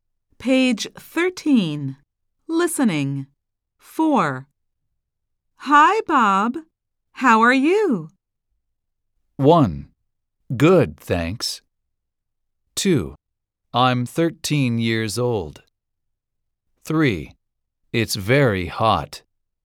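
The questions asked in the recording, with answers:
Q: Hi, Bob. How are you?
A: 1: Good, thanks.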